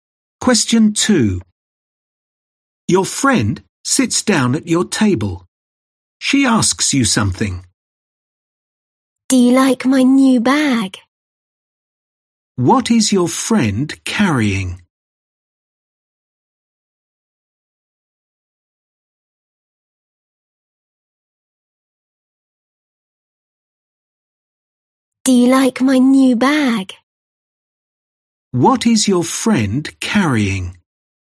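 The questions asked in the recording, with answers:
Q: What is your friend carrying?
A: A new bag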